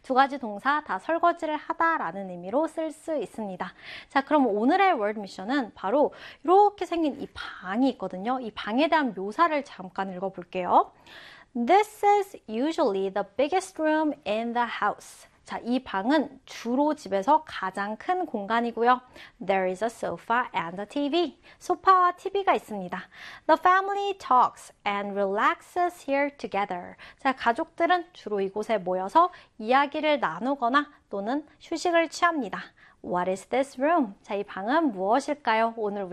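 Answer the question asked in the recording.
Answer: the living room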